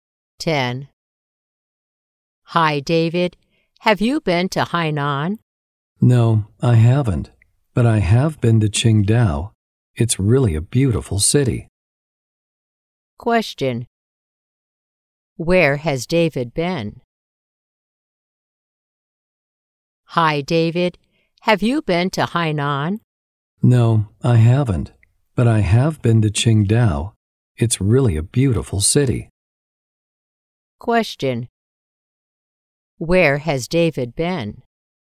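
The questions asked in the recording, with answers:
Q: Where has David been?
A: Qingdao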